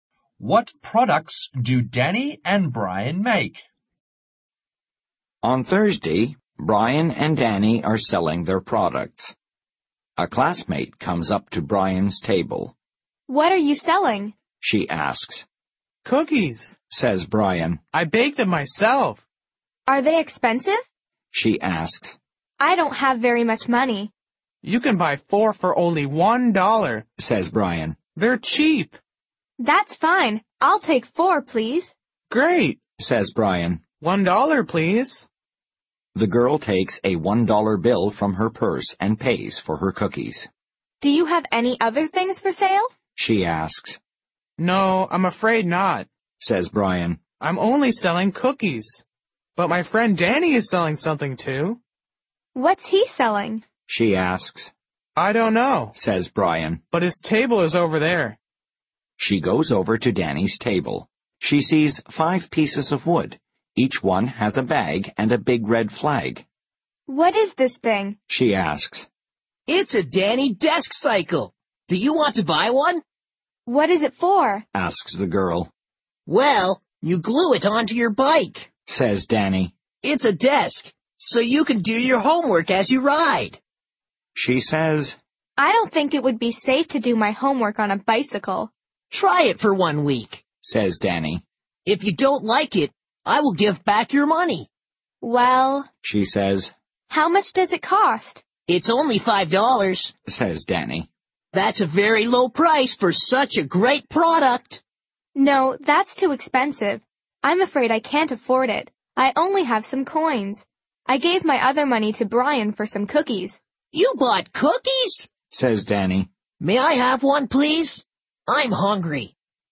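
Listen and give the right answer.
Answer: Brian makes cookies and Danny makes desk cycles.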